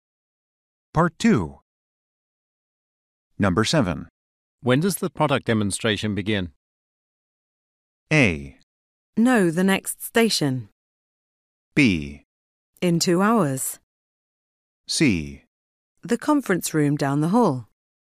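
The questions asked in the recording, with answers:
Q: When does the product demonstration begin?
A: B: In 2 hours.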